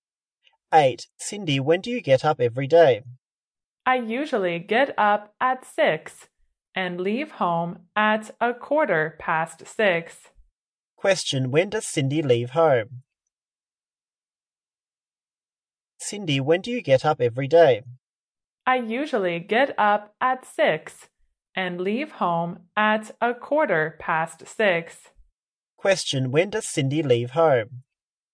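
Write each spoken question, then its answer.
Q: when does Cindy leave home?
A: At 6:15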